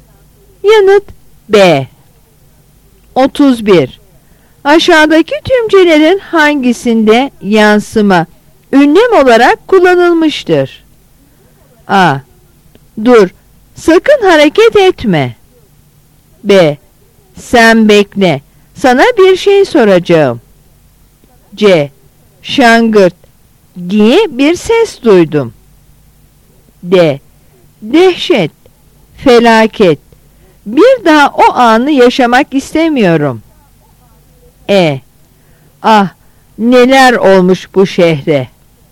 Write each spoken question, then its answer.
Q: Aşağıdaki tümcelerin hangisinde yansıma ünlem olarak kullanılmıştır?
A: Yanıt C.